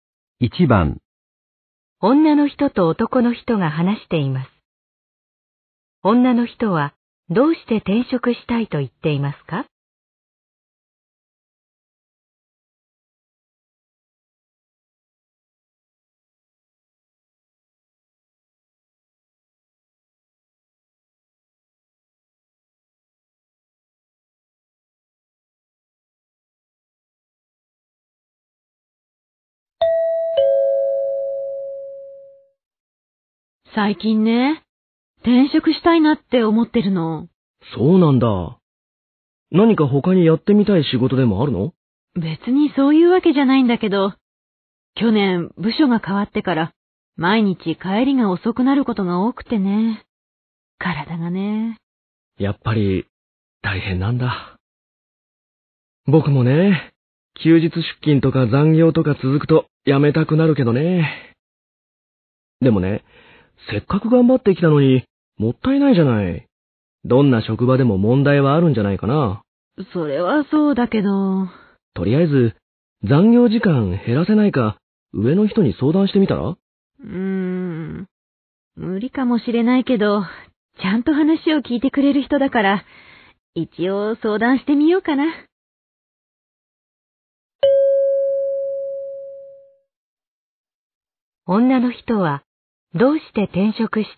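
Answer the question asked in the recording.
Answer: 部署が変わって毎日帰りが遅く、体がつらいから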